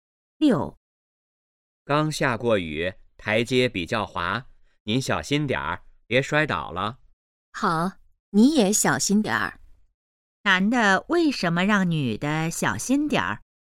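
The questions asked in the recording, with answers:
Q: 男的为什么让女的小心点儿?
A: 台阶比较滑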